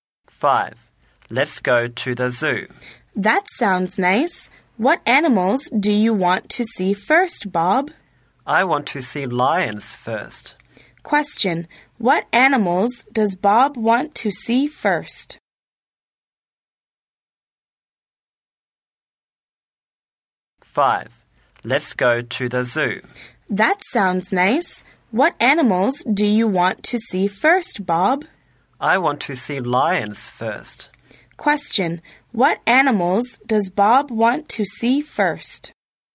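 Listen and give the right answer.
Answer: Lions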